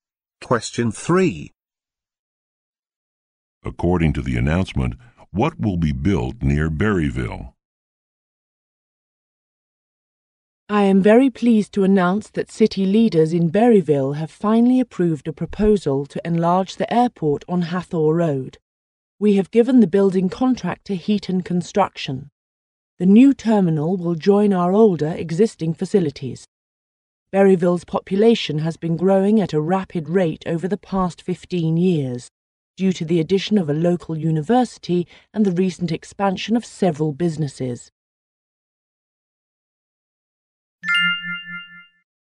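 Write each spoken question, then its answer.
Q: According to the announcement, what will be built near Berryville?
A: A new airport terminal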